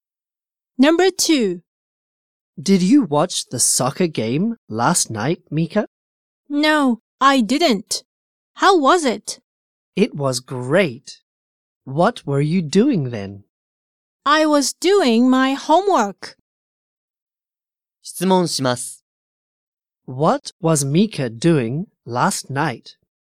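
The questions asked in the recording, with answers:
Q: What was Mika doing last night?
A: Doing her homework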